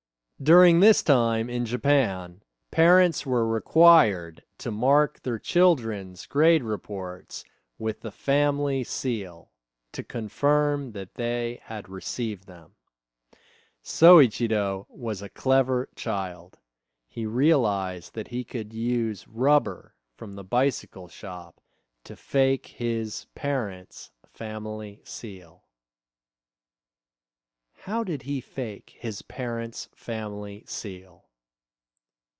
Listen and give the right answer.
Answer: He used rubber from the bicycle shop to fake his parents' family seal.